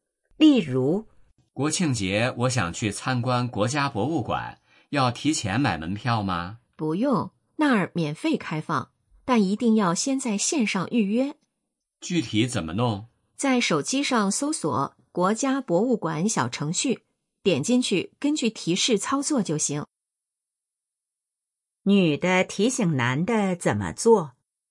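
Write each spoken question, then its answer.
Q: 女的提醒男的怎么做?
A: 先在网上(用国家博物馆小程序)预约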